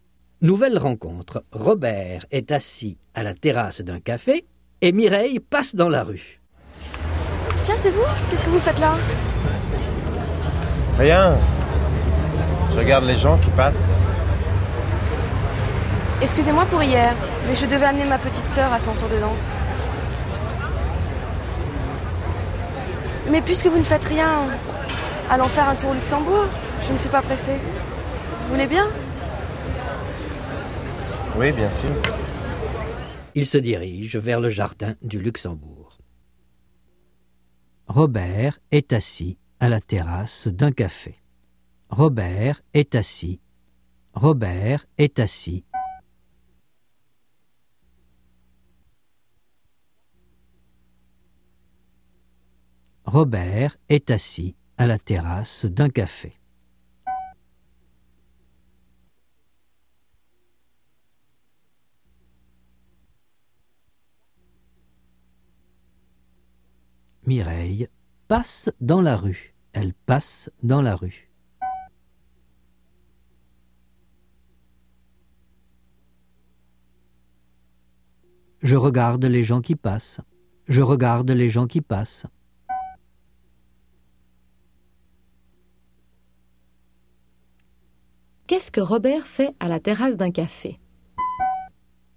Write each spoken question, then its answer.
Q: Qu'est-ce que Robert fait à la terrasse d'un café ?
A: Il regarde les gens qui passent.